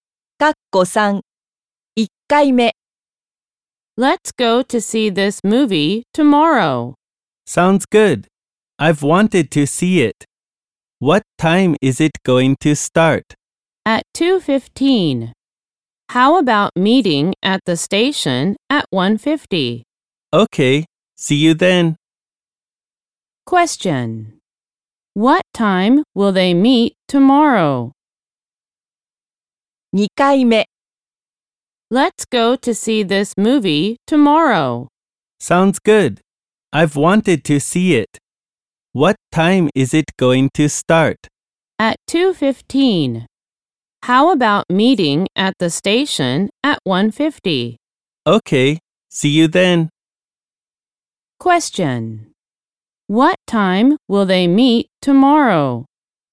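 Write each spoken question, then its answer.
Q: What time will they meet tomorrow?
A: At 1:50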